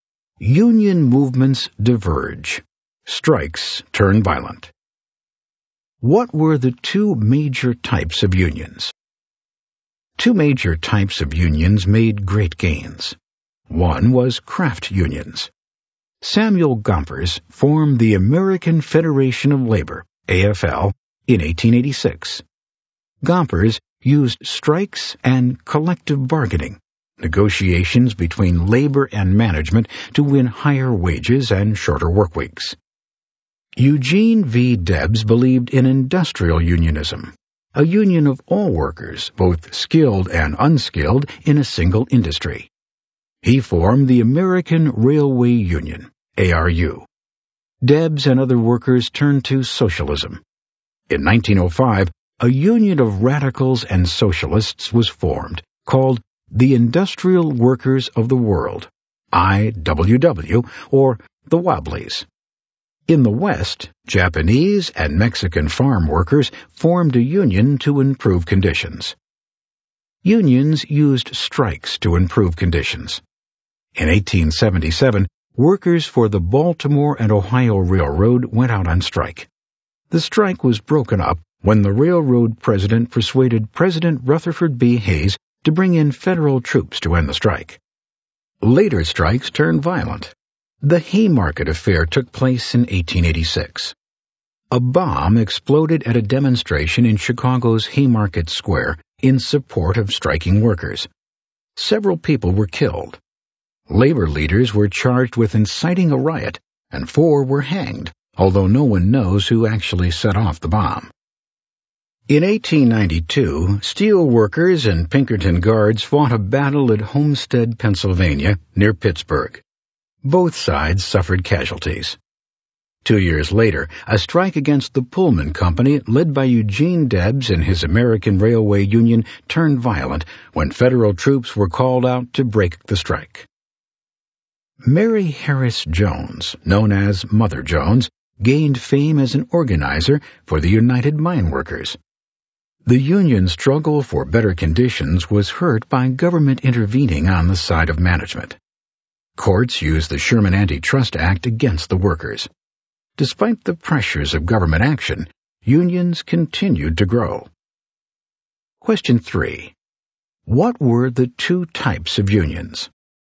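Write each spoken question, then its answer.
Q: What were the two types of unions?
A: Craft unions and industrial unions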